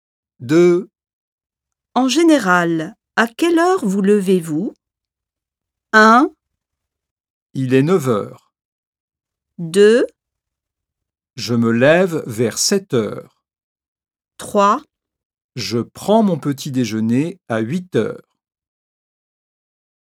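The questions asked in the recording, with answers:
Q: En général, à quelle heure vous levez-vous?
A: 2: Je me lève vers 7h.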